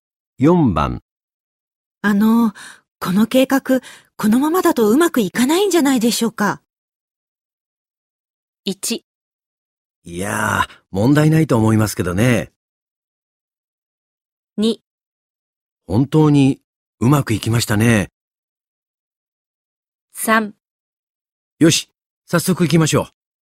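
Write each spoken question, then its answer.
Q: あの、この計画、このままだとうまくいかないんじゃないでしょうか。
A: 1: いやー、問題ないと思いますけどね。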